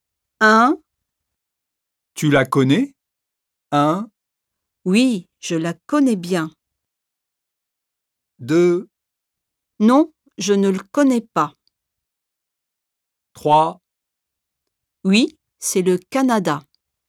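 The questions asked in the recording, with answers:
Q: Tu la connais ?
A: 1: Oui, je la connais bien.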